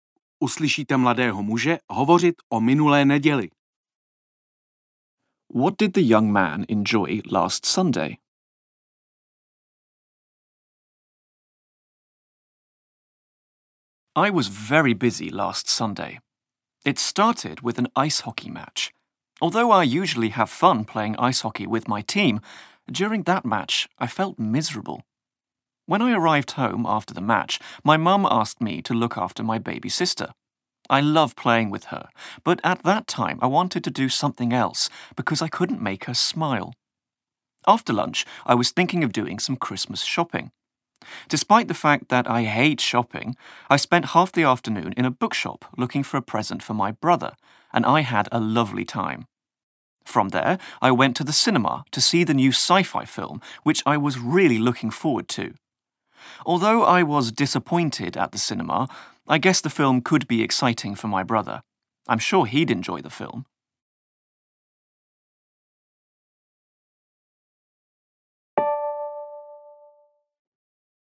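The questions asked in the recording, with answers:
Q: What did the young man enjoy last Sunday?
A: Shopping for a present in the bookshop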